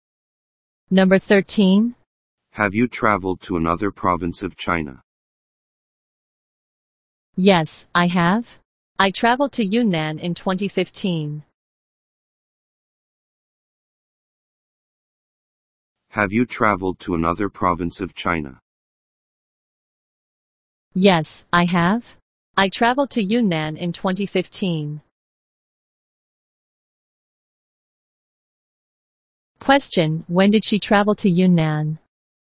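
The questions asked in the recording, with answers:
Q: when did she travel to Yunnan?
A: In 2015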